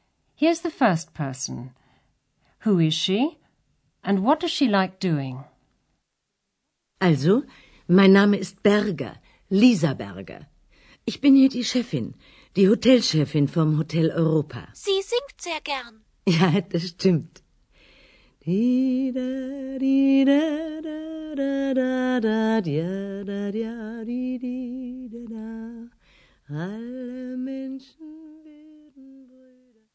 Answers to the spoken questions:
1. That was Frau Berger, the manageress of the Hotel Europa.
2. Frau Berger likes singing.